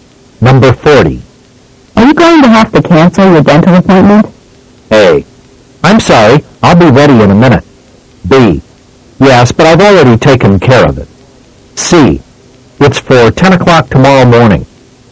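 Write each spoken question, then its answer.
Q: Are you going to have to cancel your dental appointment?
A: B: Yes, but I've already taken care of it.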